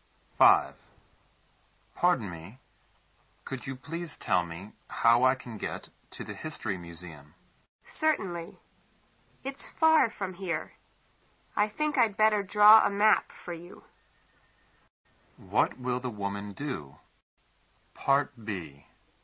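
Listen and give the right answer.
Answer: Draw a map for the man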